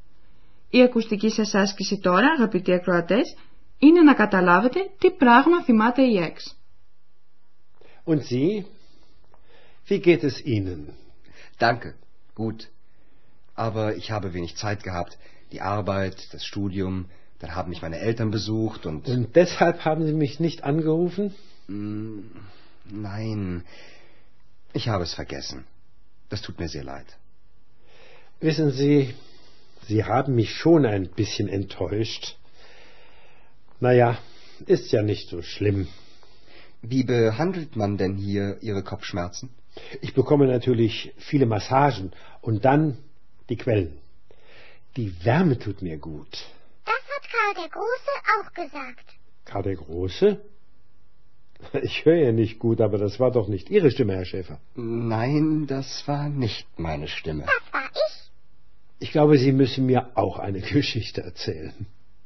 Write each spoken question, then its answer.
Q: Η ακουστική σας άσκηση τώρα, αγαπητοί ακροατές, είναι να καταλάβετε τι πράγμα θυμάται η έξ.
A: Η ΕΚ θυμάται τη συνέντευξη του Ανδρέα με τον αυτοκράτορα Καρλομάγνο που είχε πει πως οι θερμές πηγές του έκαναν καλό.